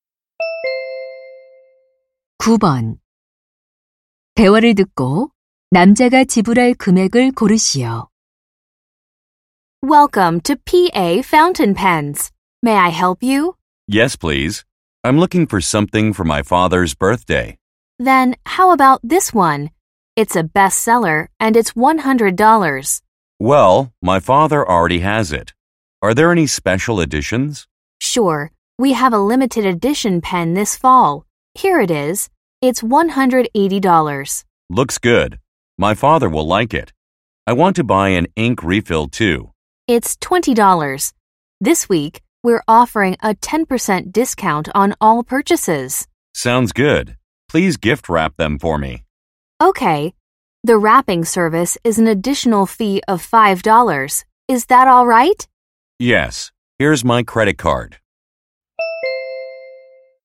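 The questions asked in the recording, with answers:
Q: 대화를 듣고 남자가 지불할 금액을 고르시오.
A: 185달러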